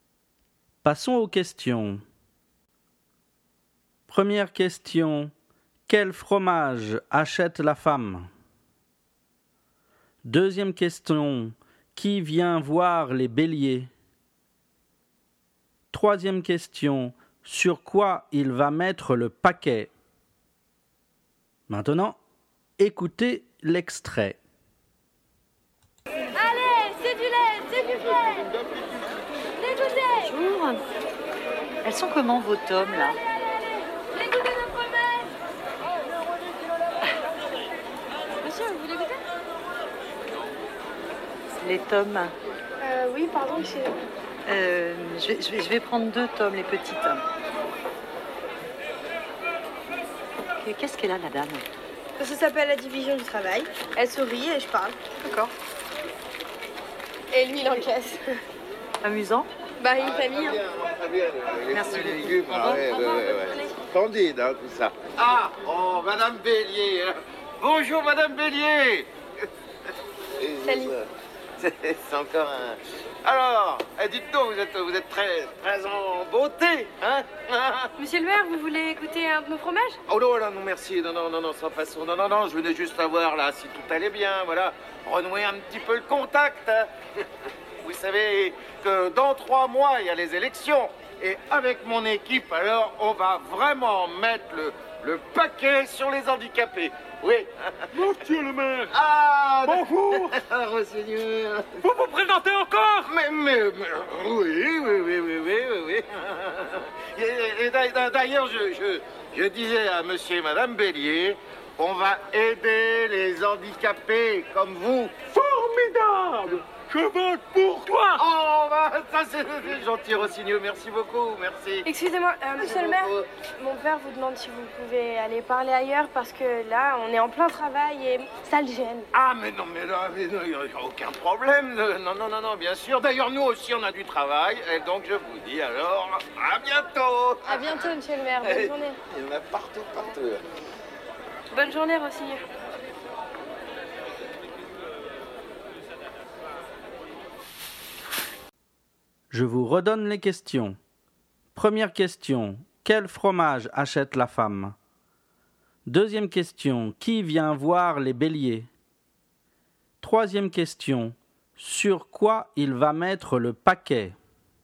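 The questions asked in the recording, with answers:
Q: Quel fromage achète la femme?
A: Deux petites tommes

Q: Qui vient voir les béliers?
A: Le maire

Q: Sur quoi il va mettre le paquet?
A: Sur les handicapés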